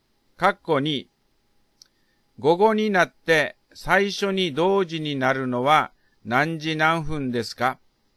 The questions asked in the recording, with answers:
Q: 括弧2、午後になって最初に同時になるのは何時何分ですか?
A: 午前9時から3時間44分後は午後12時44分ですね。